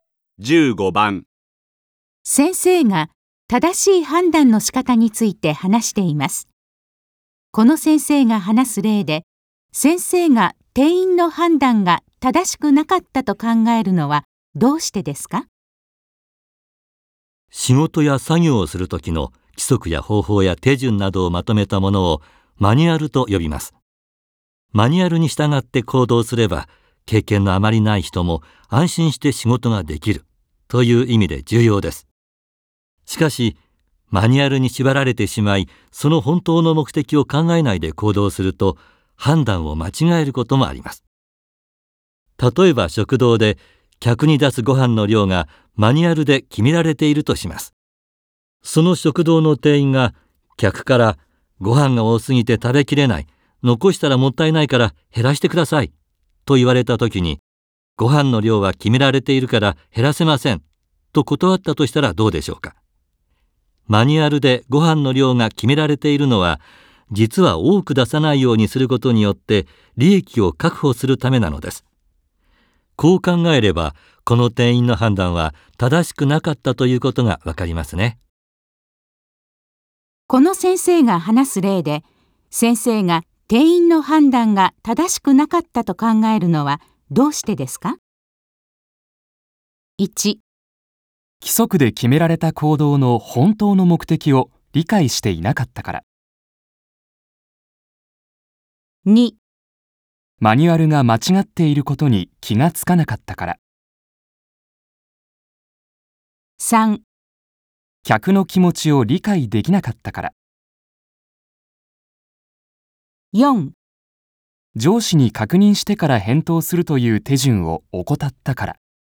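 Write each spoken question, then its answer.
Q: この先生が話す例で、先生が店員の判断が正しくなかったと考えるのはどうしてですか?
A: 1: 規則で決められた行動の本当の目的を理解していなかったから。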